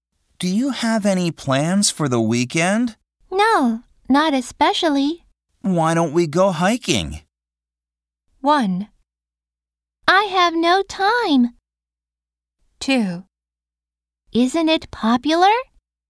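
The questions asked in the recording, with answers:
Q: Why don't we go hiking?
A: 3: Yes, I'd like that.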